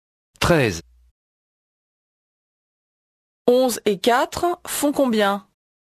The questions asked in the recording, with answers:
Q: 11 et 4 font combien?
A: 15.